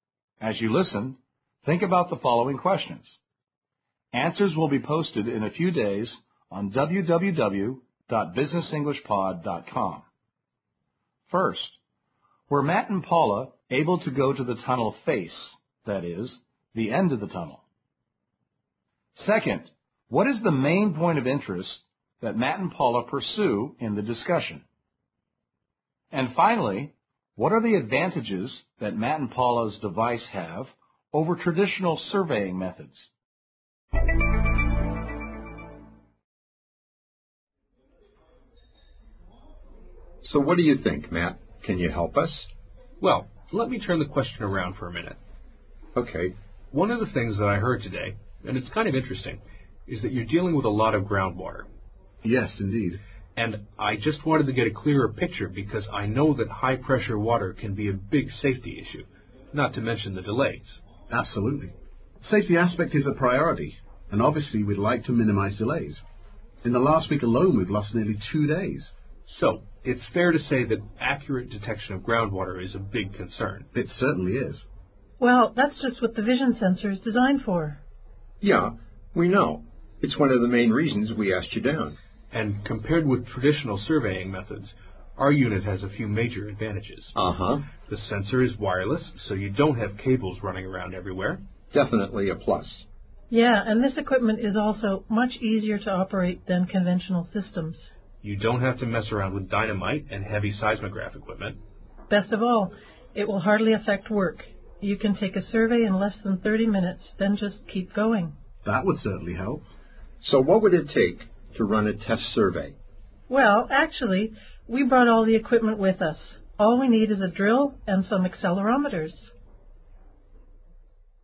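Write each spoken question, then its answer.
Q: what is the main point of interest that Matt and Paula pursue in the discussion?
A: Groundwater: accurate detection of high-pressure groundwater, a safety and delay concern

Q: what are the advantages that Matt and Paula's device have over traditional surveying methods?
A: It is wireless, easier to operate (no dynamite or heavy seismograph equipment), and hardly affects work (a survey takes under 30 minutes)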